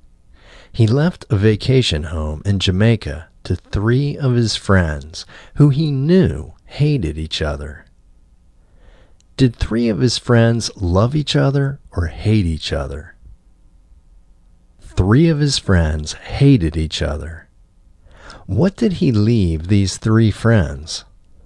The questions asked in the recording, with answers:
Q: What did he leave these three friends?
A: He left these three friends a vacation home in Jamaica.